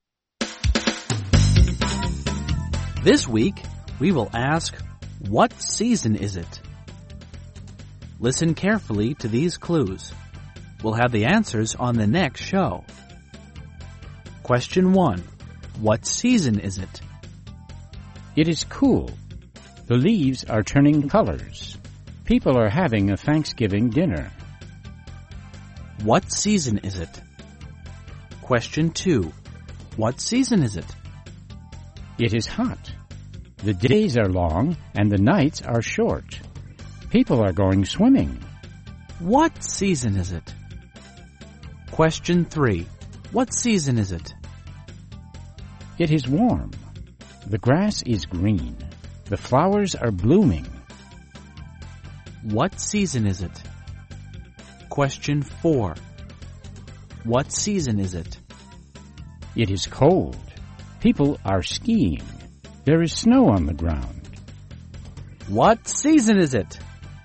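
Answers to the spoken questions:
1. Fall (autumn)
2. Summer
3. Spring
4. Winter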